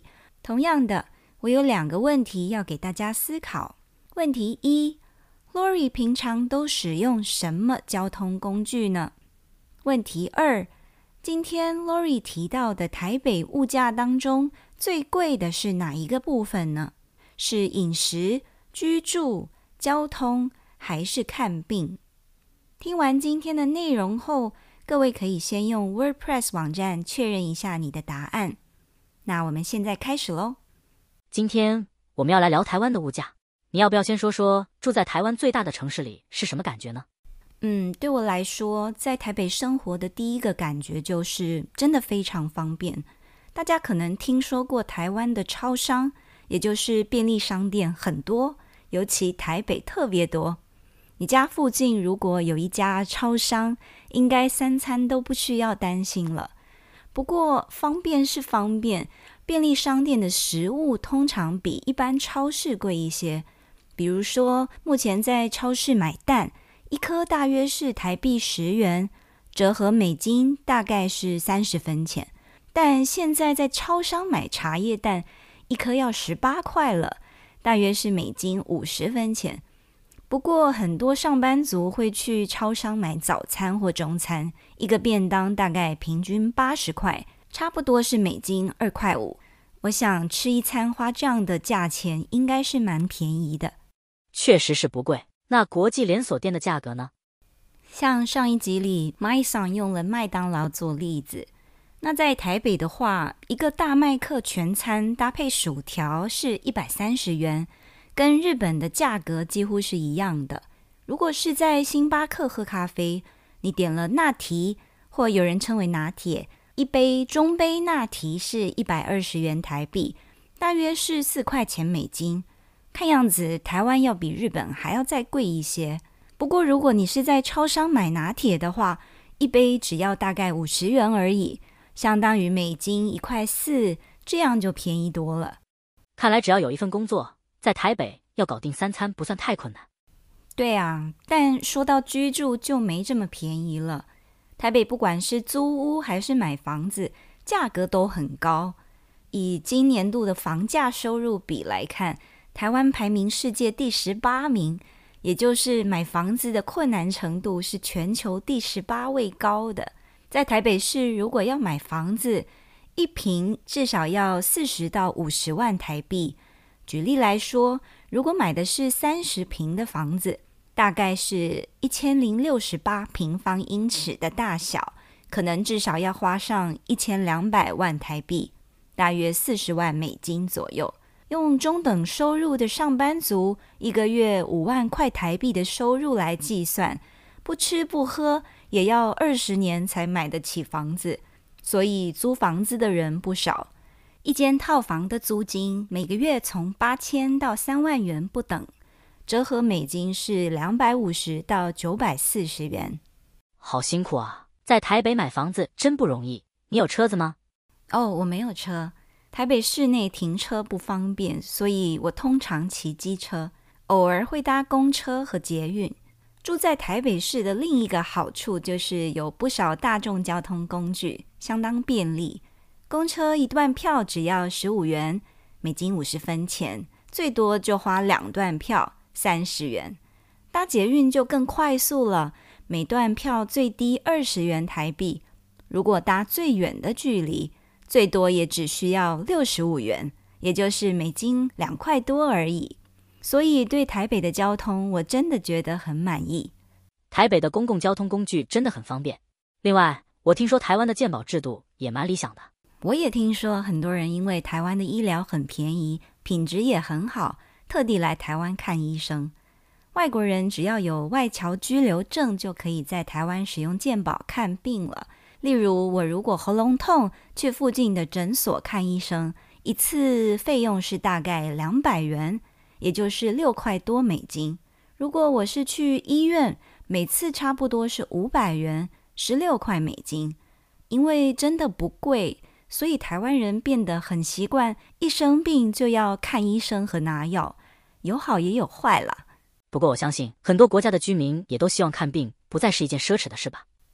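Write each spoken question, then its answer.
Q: Lori 平常都使用什么交通工具呢?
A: 机车(偶尔搭公车和捷运)

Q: 今天 Lori 提到的台北物价当中最贵的是哪一个部分呢? 是饮食、居住、交通还是看病?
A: 居住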